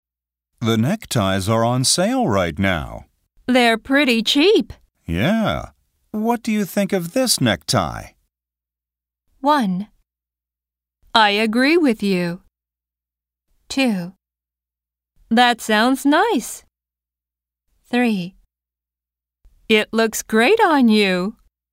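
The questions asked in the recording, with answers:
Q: What do you think of this necktie?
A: 3: It looks great on you.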